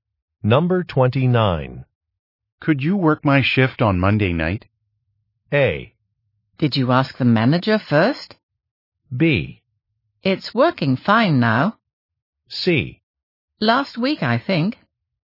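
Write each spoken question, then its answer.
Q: Could you work my shift on Monday night?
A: A: Did you ask the manager first?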